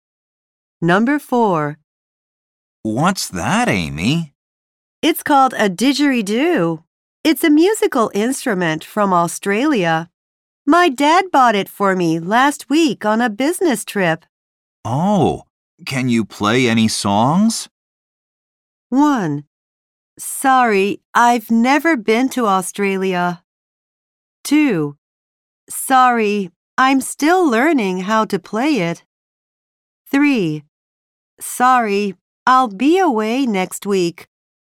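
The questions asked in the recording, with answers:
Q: Oh, can you play any songs?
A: 2: Sorry, I'm still learning how to play it.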